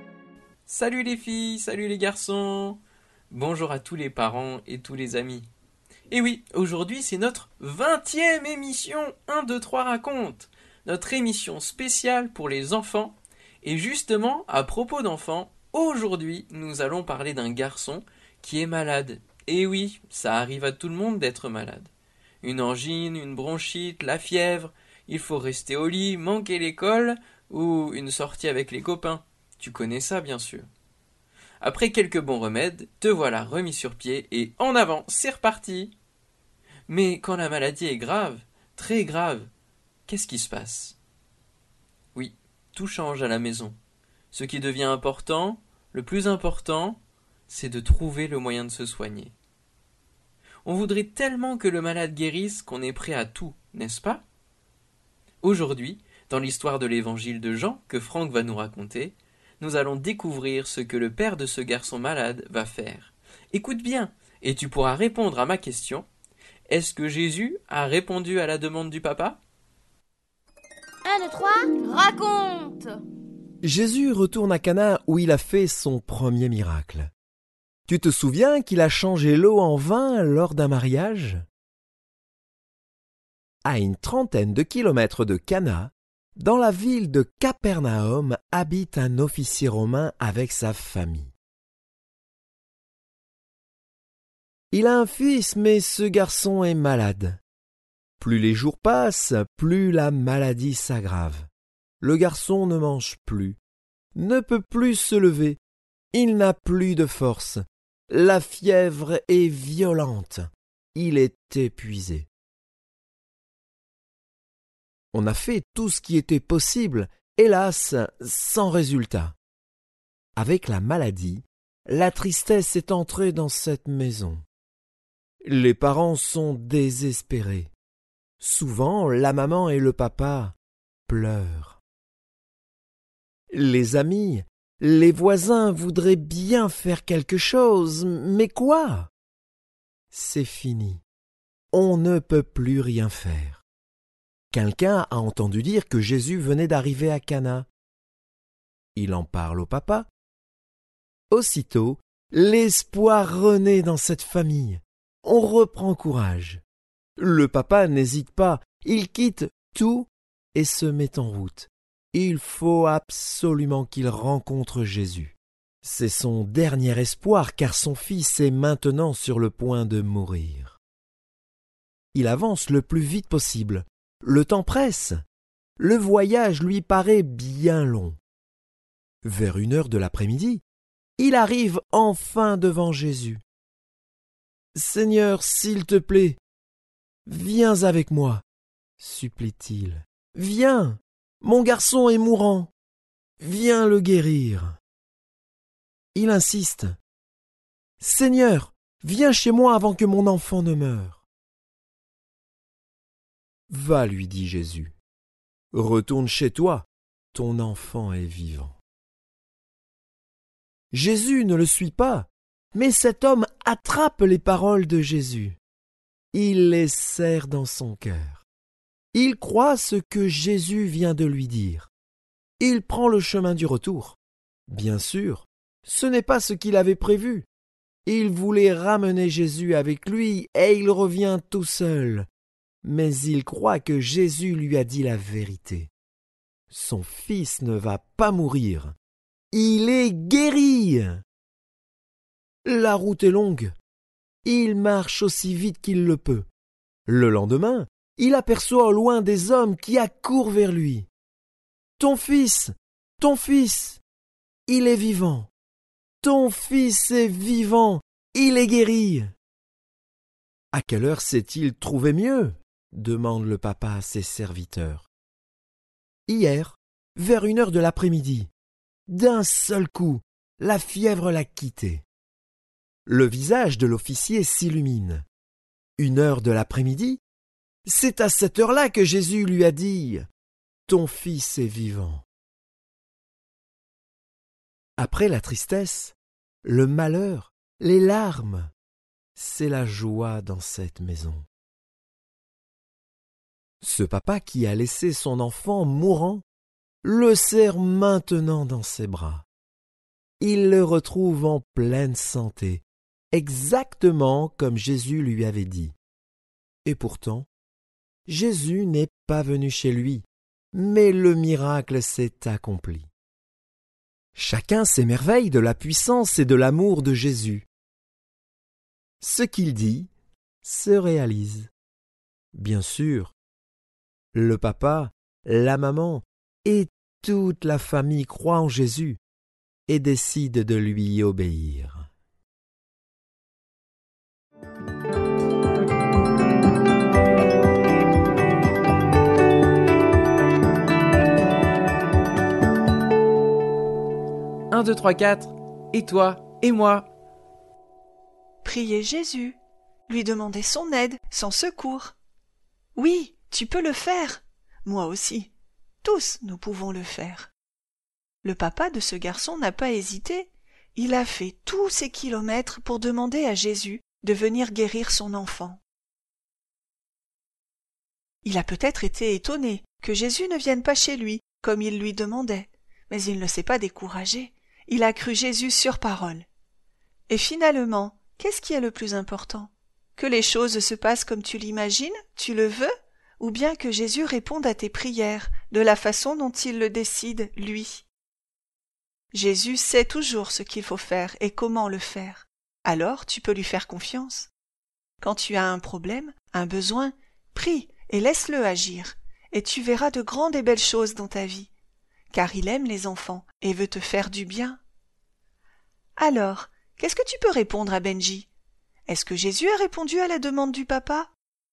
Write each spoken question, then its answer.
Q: Est-ce que Jésus a répondu à la demande du papa?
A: Jésus n'a pas répondu à la demande du papa de venir chez lui. Mais oui, et trois fois oui, il a répondu à sa demande, sa prière de guérir son enfant.